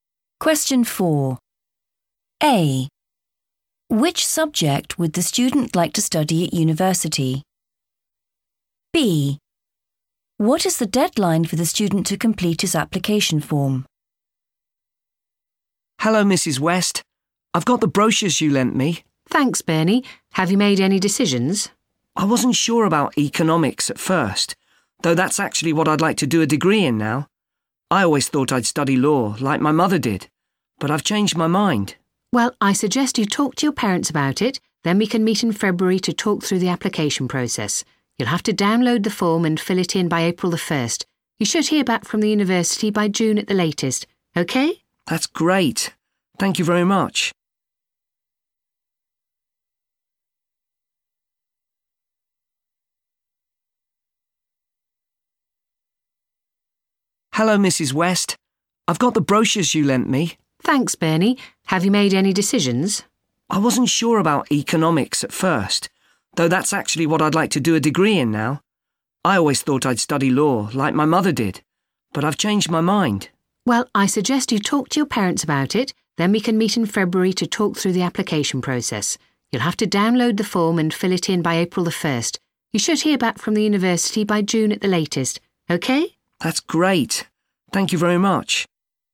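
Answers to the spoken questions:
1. economics
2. April the 1st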